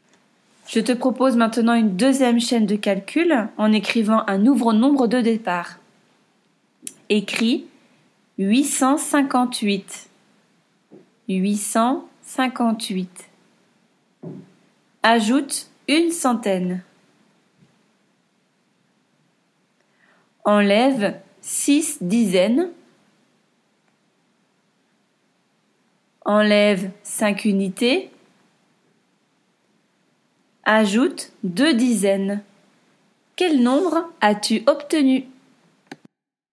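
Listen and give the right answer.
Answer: 913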